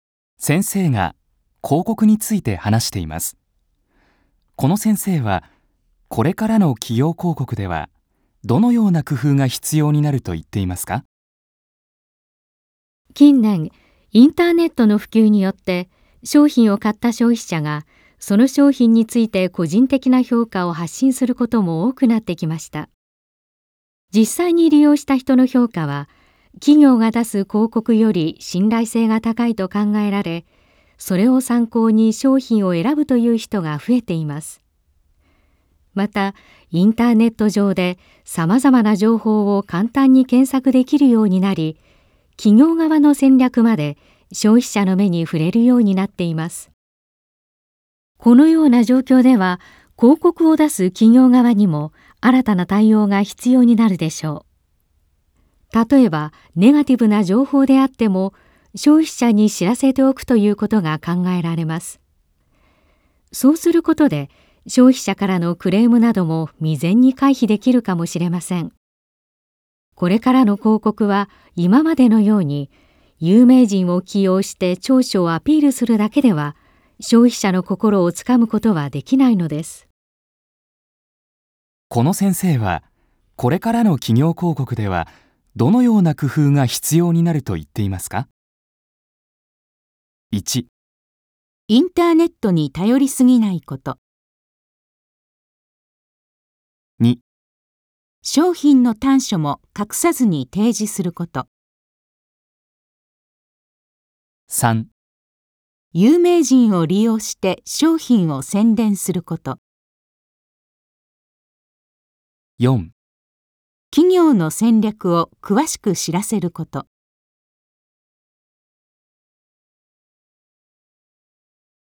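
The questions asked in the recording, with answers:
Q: この先生はこれからの企業広告ではどのような工夫が必要になると言っていますか?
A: 2: 商品の短所も隠さずに提示すること。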